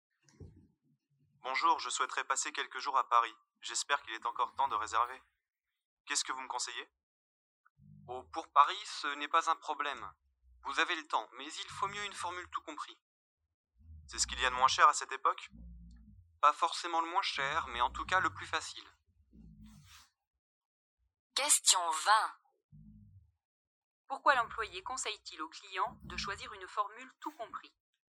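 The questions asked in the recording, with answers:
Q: Pourquoi l'employé conseille-t-il au client de choisir une formule tout compris?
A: Parce que c'est le plus facile (pas forcément le moins cher).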